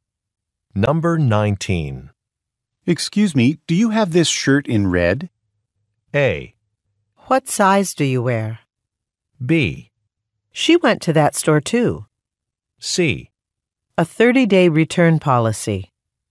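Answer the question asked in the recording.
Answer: A: What size do you wear?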